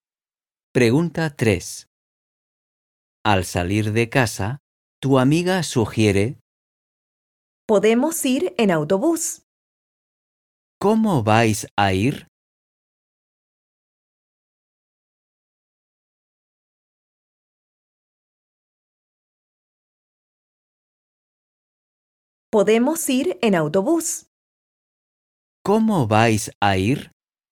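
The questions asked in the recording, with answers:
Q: ¿Cómo vais a ir?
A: En autobús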